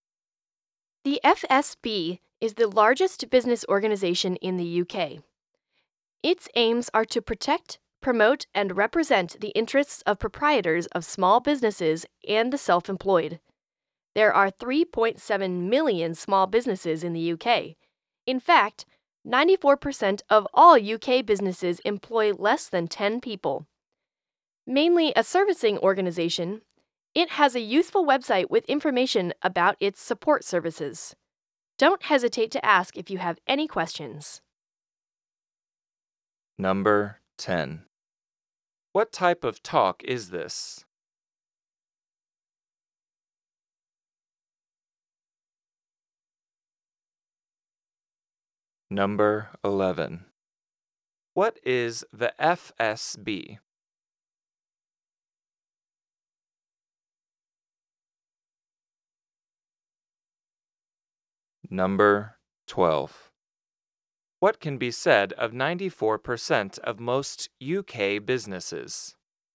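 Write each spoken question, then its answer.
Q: What is the FSB?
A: The largest business organization in the UK

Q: What can be said of 94% of most UK businesses?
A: They employ fewer than 10 people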